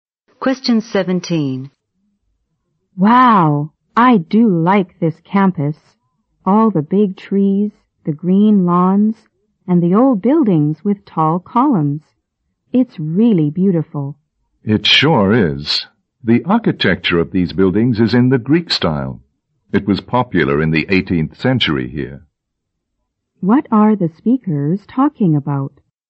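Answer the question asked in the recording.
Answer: The campus and the Greek-style architecture of its buildings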